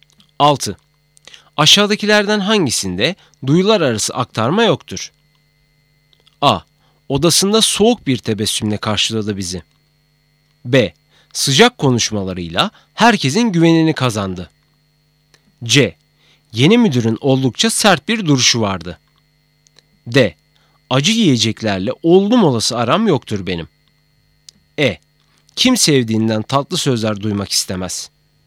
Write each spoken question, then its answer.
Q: Aşağıdakilerden hangisinde duyular arası aktarma yoktur?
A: Doğru cevap D. Acı yiyeceklerle oldum olası aram yoktur benim.